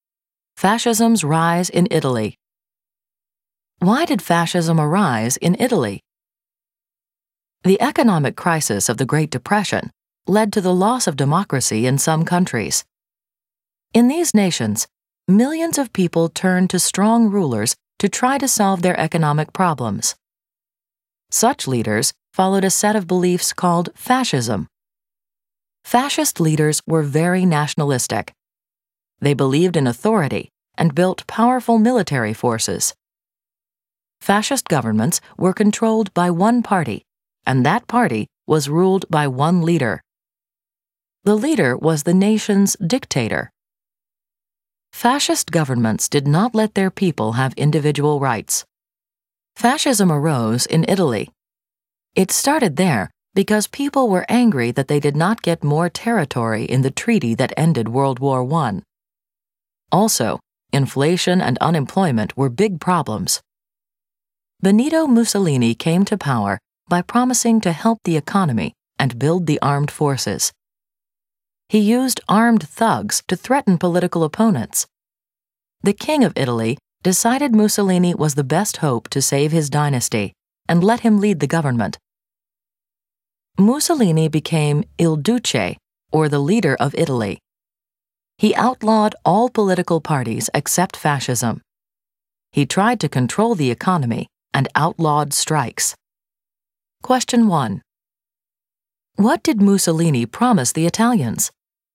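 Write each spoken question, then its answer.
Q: What did Mussolini promise the Italians?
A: To help the economy and build the armed forces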